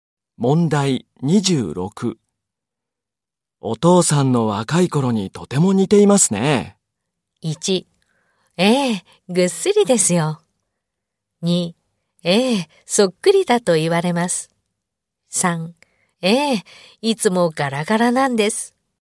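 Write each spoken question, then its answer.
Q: お父さんの若い頃にとても似ていますね。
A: 3: ええ、そっくりだと言われます。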